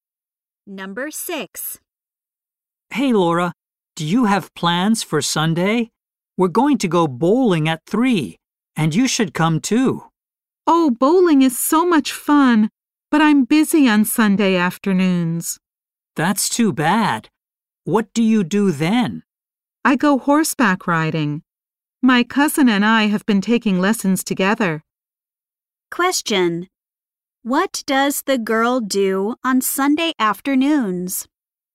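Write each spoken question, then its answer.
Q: What does the girl do on Sunday afternoons?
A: She takes horseback riding lessons with her cousin.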